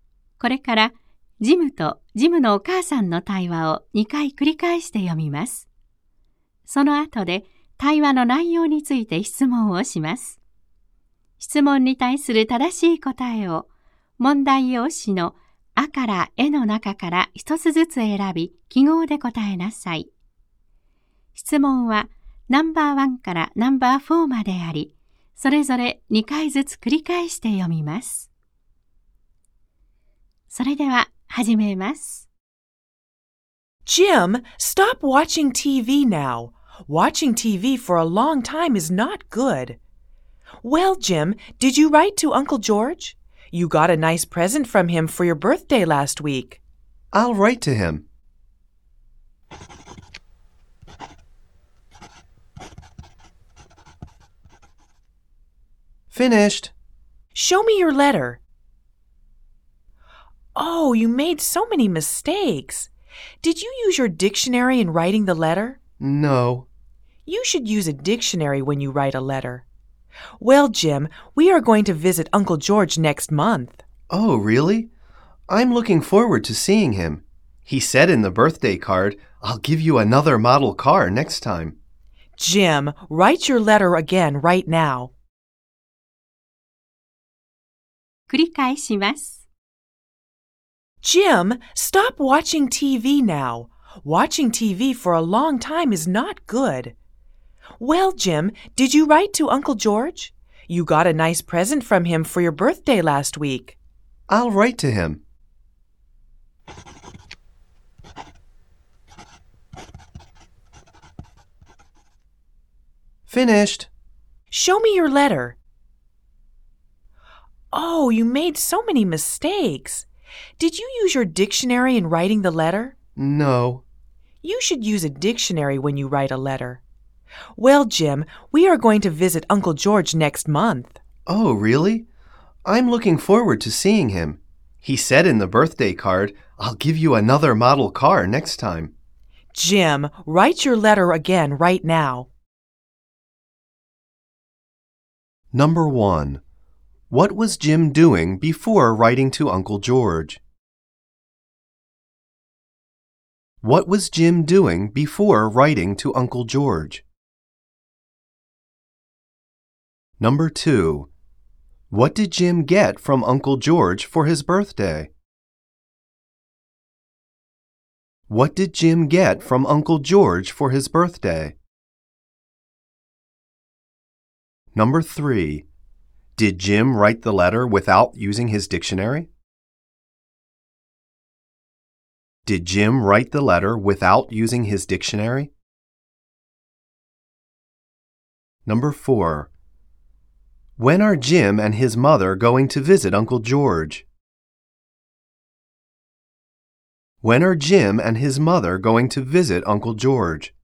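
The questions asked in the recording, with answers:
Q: What was Jim doing before writing to Uncle George?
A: He was watching TV.

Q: Did Jim write the letter without using his dictionary?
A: Yes, he did.

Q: When are Jim and his mother going to visit Uncle George?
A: Next month.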